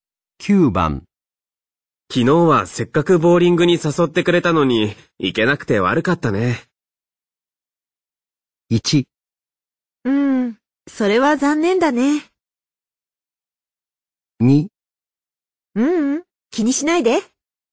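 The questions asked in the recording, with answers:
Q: 昨日はせっかくボーリングに誘ってくれたのに、行けなくて悪かったね。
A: 2: ううん、気にしないで。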